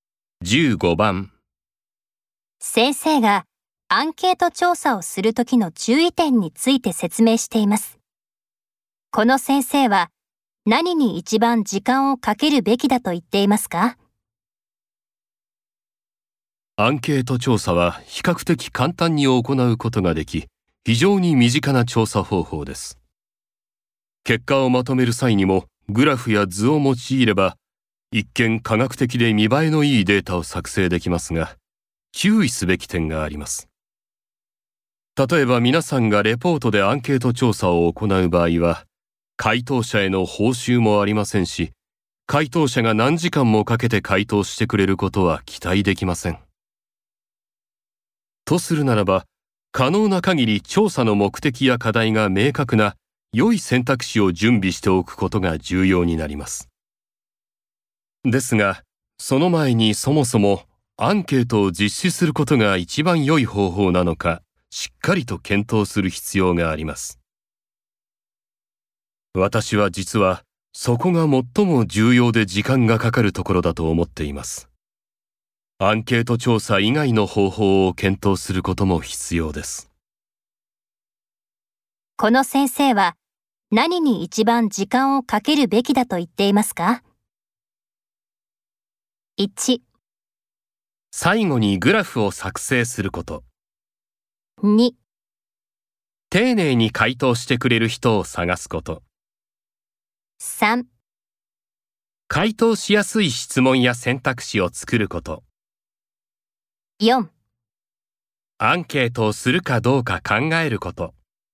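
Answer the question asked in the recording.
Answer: 4: アンケートをするかどうか考えること。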